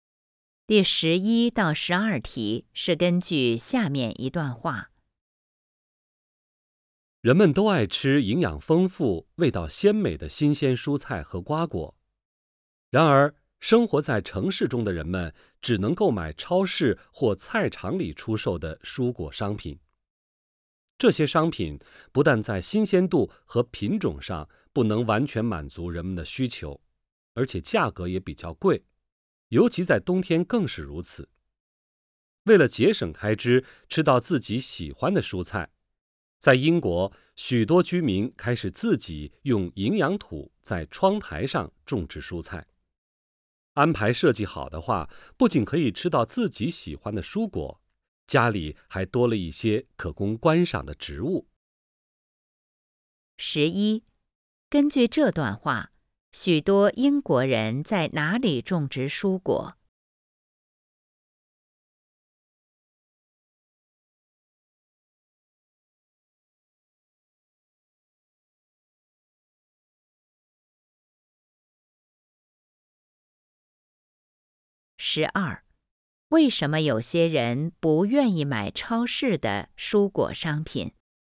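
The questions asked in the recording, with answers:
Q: 根据这段话,许多英国人在哪里种植蔬果?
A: 窗台上

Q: 为什么有些人不愿意买超市的蔬果商品?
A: 不够新鲜、品种少,而且价格较贵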